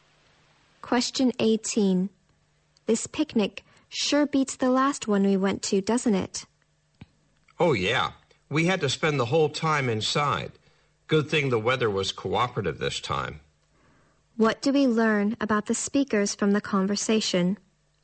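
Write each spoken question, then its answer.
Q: What do we learn about the speakers from the conversation?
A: The weather was bad at their last picnic, so they had to stay inside.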